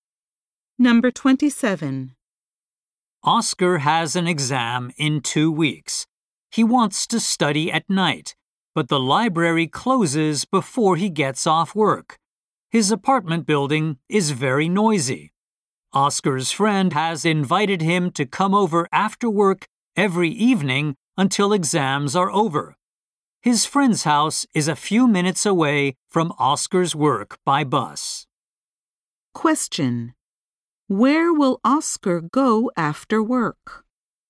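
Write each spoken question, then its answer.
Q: Where will Oscar go after work?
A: To his friend's house.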